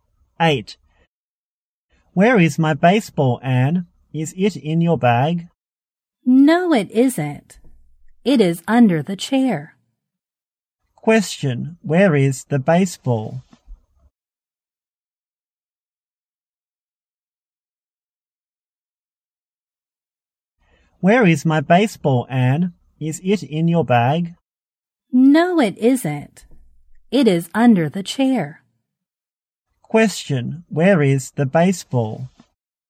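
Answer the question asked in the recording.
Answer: Under the chair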